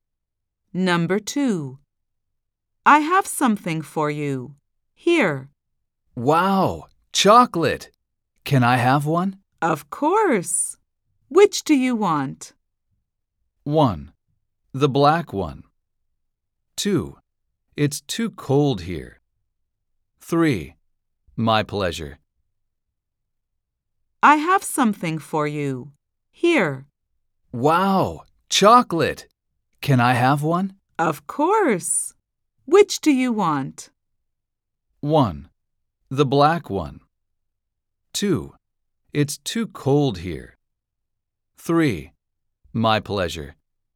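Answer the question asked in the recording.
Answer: 1: The black one.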